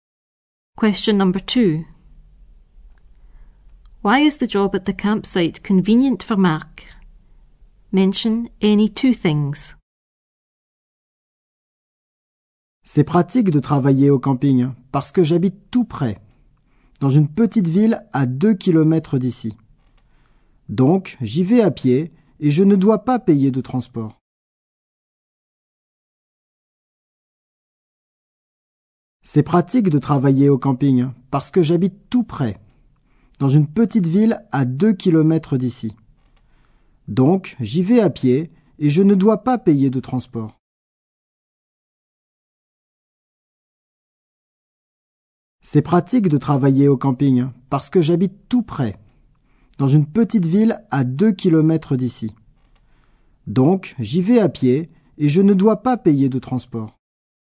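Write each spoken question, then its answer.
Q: Why is the job at the campsite convenient for Marc?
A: He lives nearby (small town 2 km away), walks there, doesn't pay for transport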